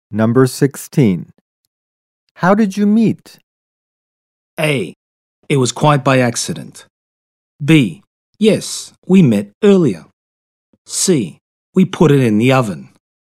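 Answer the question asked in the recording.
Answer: A: It was quite by accident.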